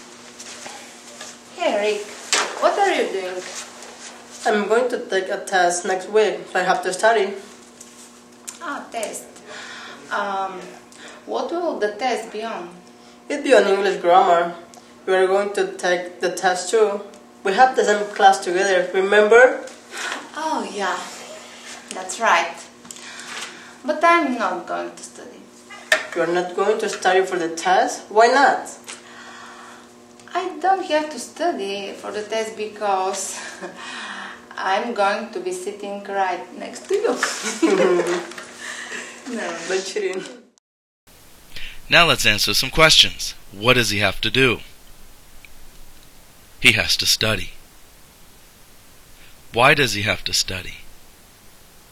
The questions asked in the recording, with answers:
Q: Why does he have to study?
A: He's going to take a test.